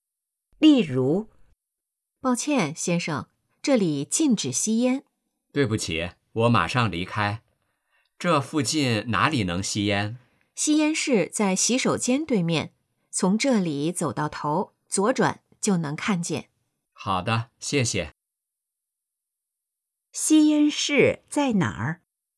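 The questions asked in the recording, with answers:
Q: 吸烟室在哪儿?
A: 在洗手间对面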